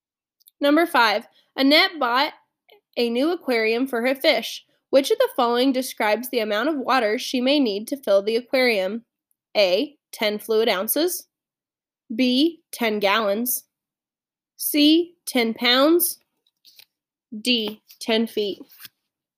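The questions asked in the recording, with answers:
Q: Which of the following describes the amount of water she may need to fill the aquarium?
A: B: 10 gallons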